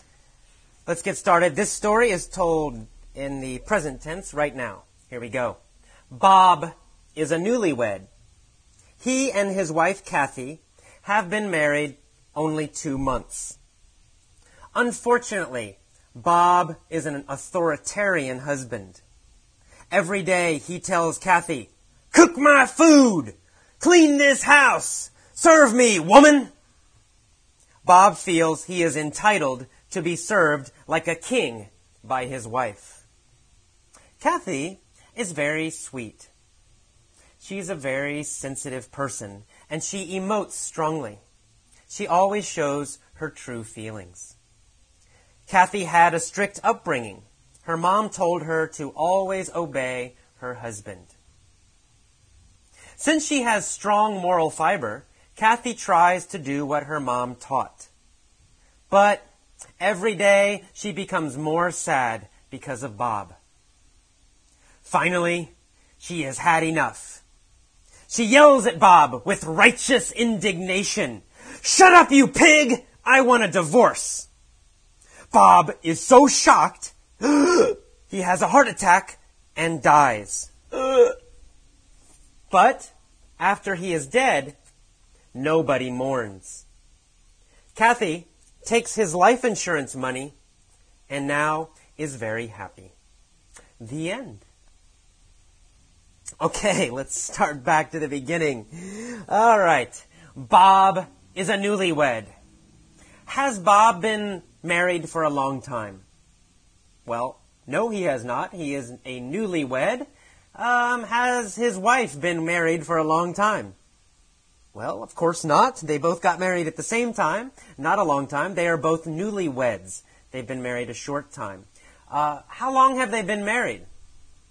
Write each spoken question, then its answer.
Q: How long have they been married?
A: Well, they've been married only 2 months.